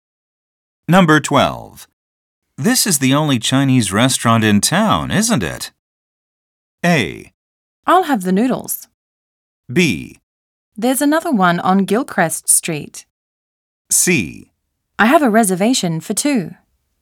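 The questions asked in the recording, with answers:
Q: This is the only Chinese restaurant in town, isn't it?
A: B: There's another one on Gilchrist Street.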